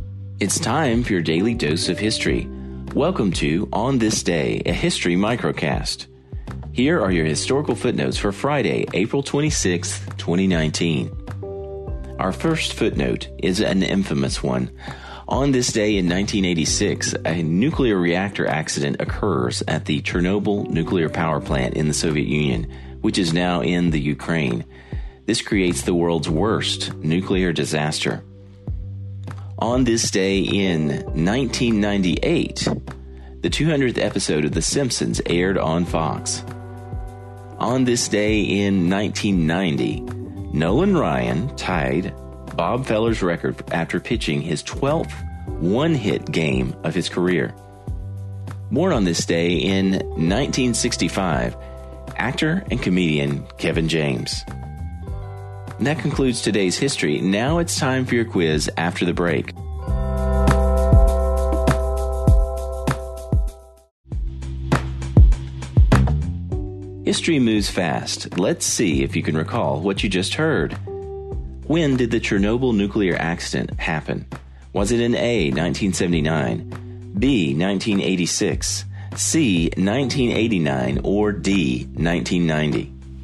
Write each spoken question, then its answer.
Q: When did the Chernobyl nuclear accident happen?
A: The answer, B, 1986.